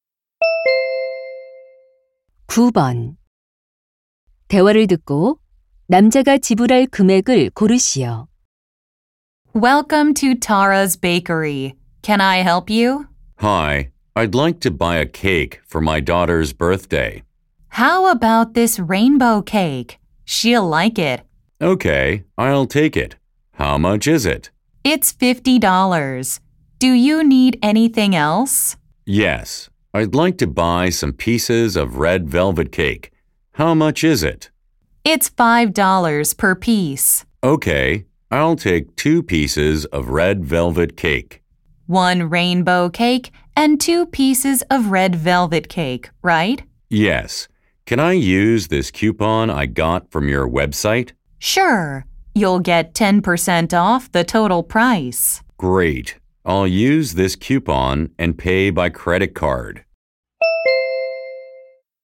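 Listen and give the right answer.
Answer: $54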